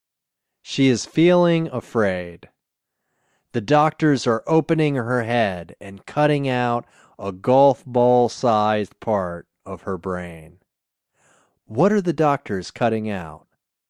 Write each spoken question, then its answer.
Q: What are the doctors cutting out?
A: The doctors are cutting out a golf ball-sized part of her brain.